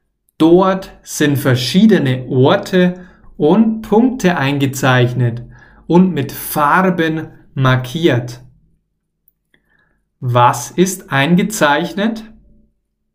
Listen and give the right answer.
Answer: Viele verschiedene Orte und Punkte.